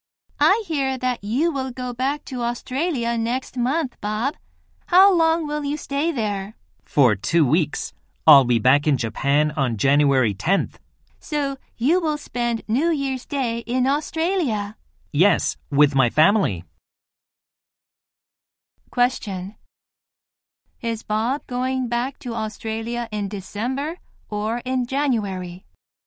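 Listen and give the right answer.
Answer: In December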